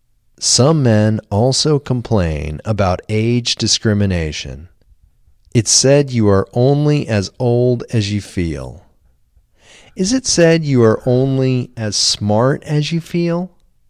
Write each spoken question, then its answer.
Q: Is it said you are only as smart as you feel?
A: No, it's not said you are only as smart as you feel.